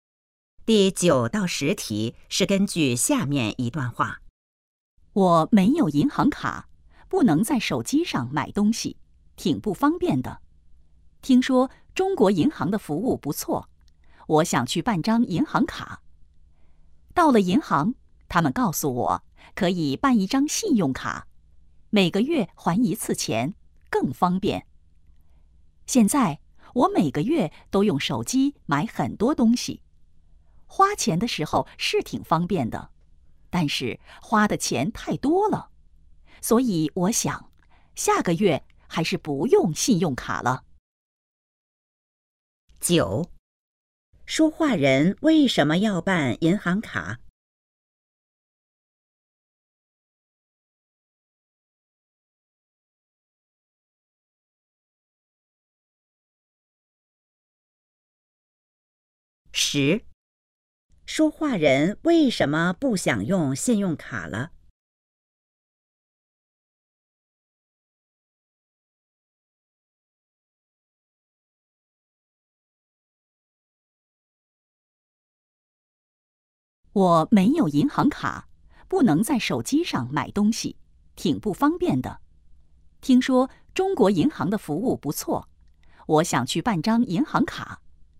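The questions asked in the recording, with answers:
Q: 说话人为什么要办银行卡?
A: 没有银行卡不能在手机上买东西

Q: 说话人为什么不想用信用卡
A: 花的钱太多了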